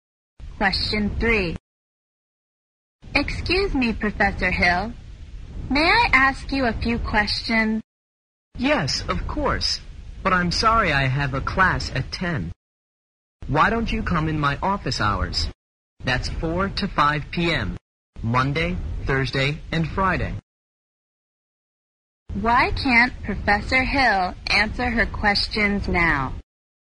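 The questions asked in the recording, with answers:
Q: Why can't Professor Hill answer her questions now?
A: He has a class at 10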